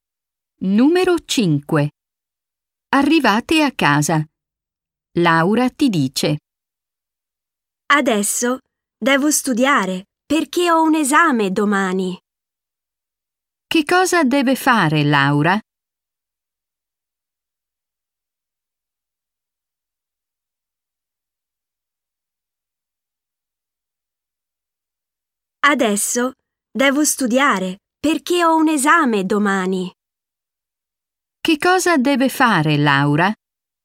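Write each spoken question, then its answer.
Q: Che cosa deve fare Laura?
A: Studiare per un esame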